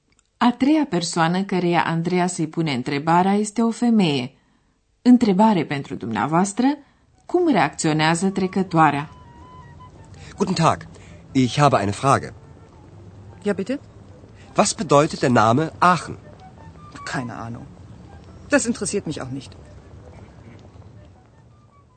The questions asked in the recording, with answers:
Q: Întrebare pentru dumneavoastră, cum reacționează trecătoarea?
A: Trecătoarea spune, n-am idee.